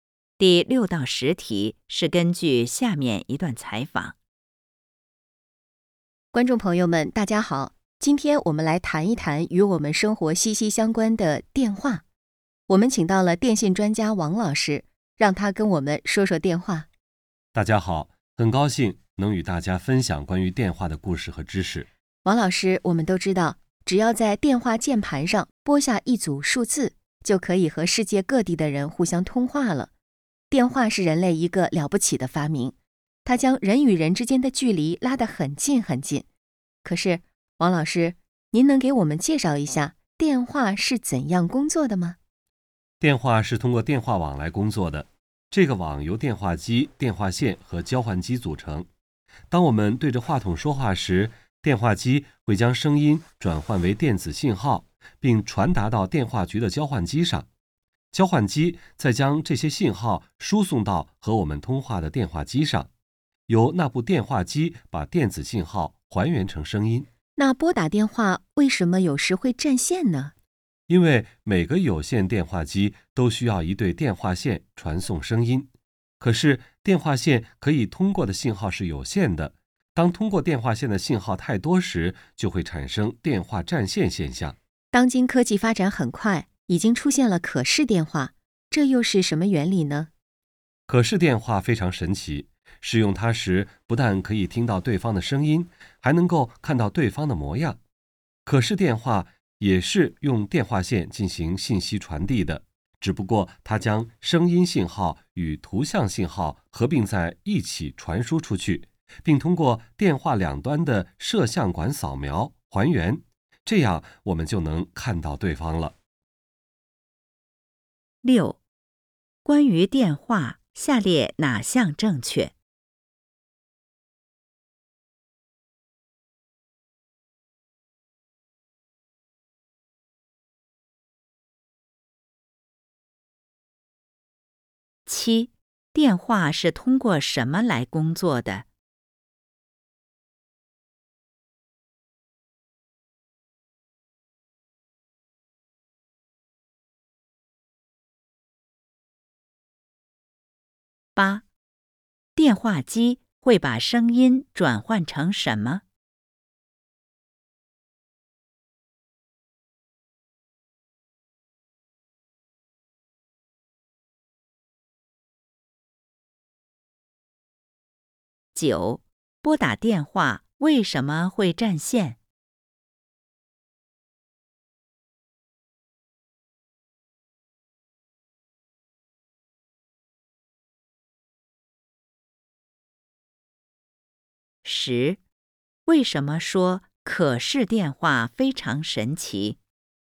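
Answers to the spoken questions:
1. 电话网
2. 电子信号
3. 电话线可以通过的信号有限,信号太多时就会占线
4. 不但能听到对方的声音,还能看到对方的模样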